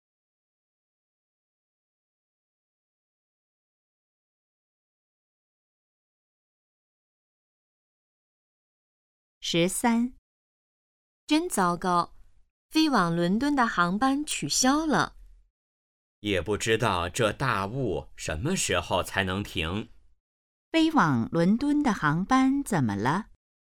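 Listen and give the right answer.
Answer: 取消了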